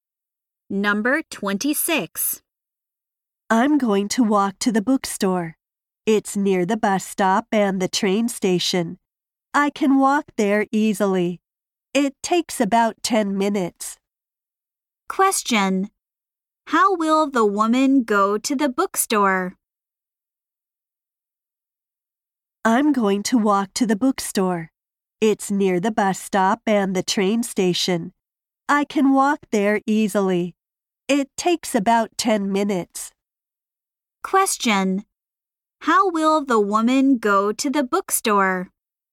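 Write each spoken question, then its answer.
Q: How will the woman go to the bookstore?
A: She will walk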